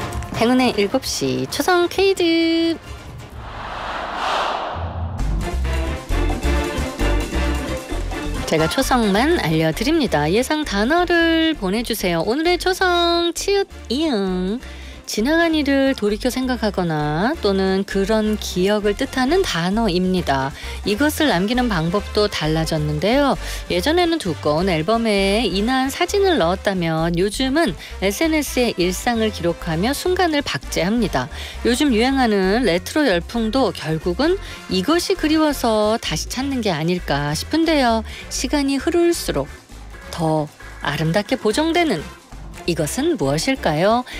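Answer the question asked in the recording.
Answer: 추억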